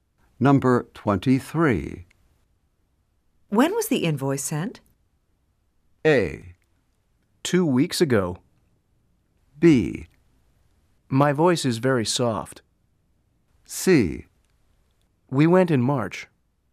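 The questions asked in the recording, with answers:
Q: When was the invoice sent?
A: A: Two weeks ago.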